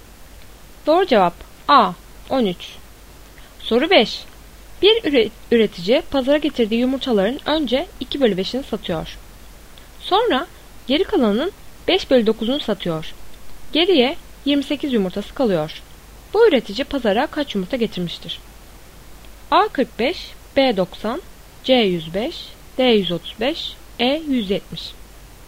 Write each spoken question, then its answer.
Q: Bu üretici pazara kaç yumurta getirmiştir?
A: Doğru cevap C 105.